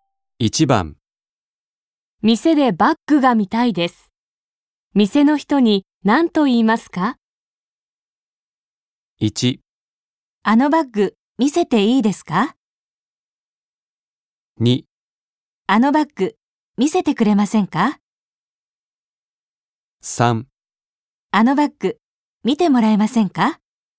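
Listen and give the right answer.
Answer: 2: あのバッグ見せてくれませんか?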